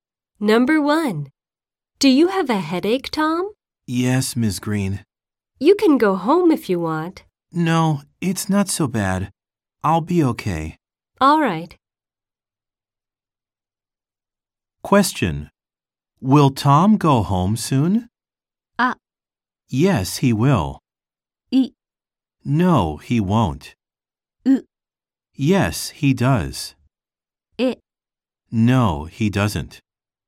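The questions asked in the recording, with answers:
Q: Will Tom go home soon?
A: い: No, he won't.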